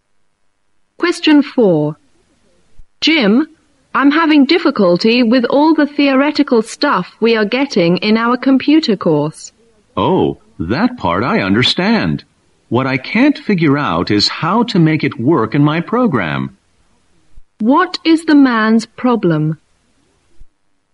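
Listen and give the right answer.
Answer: He can't apply the theory in his program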